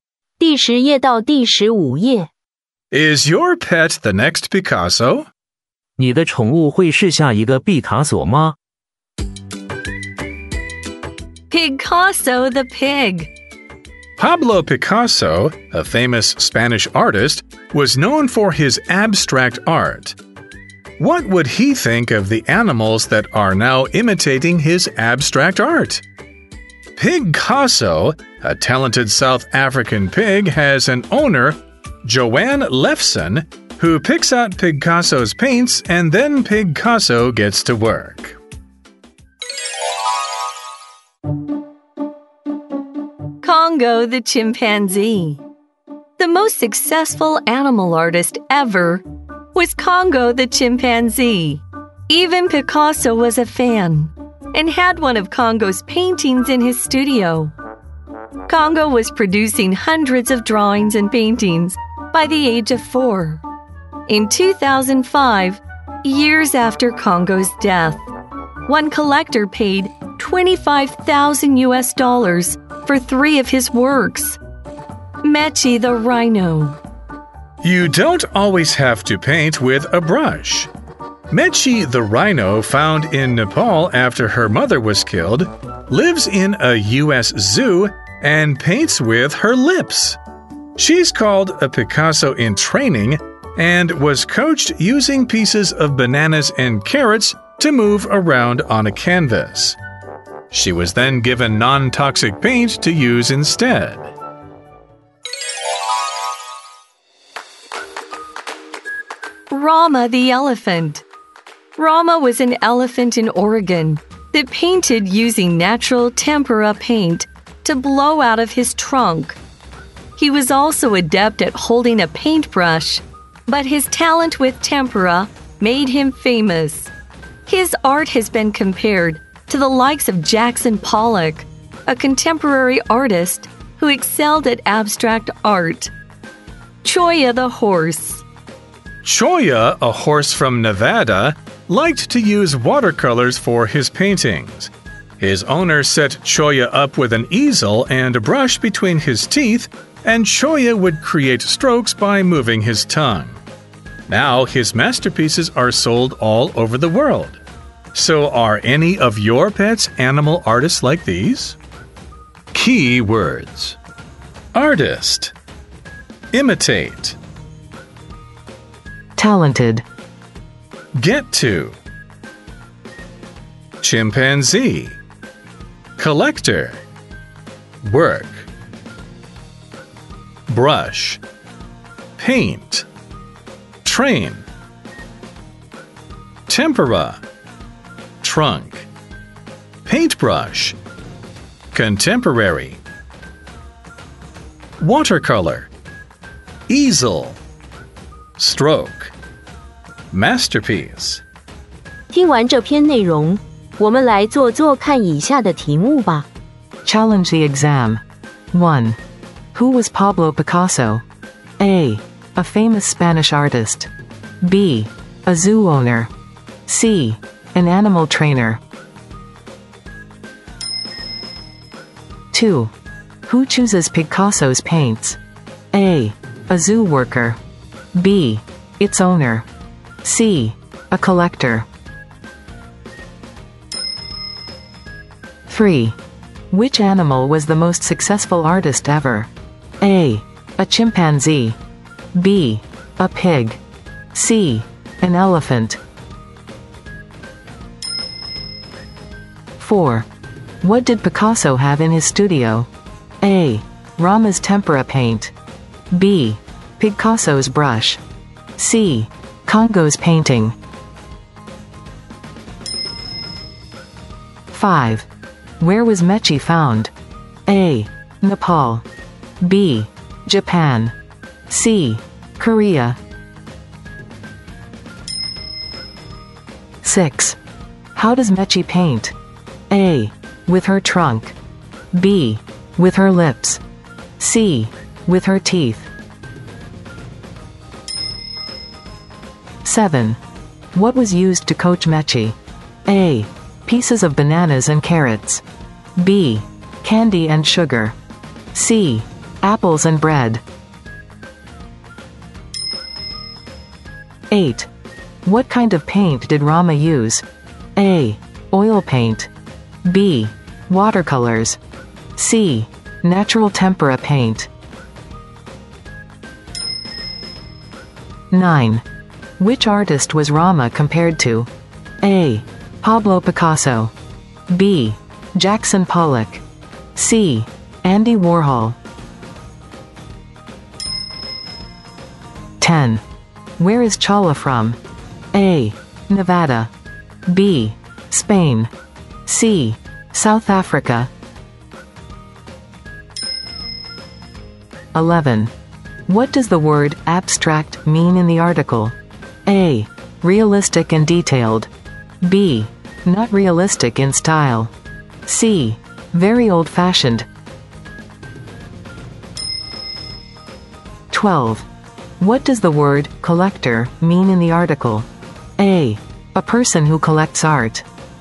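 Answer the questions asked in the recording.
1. A: A famous Spanish artist.
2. B: Its owner.
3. A: A chimpanzee.
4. C: Congo's painting.
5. A: Nepal.
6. B: With her lips.
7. A: Pieces of bananas and carrots.
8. C: Natural tempera paint.
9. B: Jackson Pollock.
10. A: Nevada.
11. B: Not realistic in style.
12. A: A person who collects art.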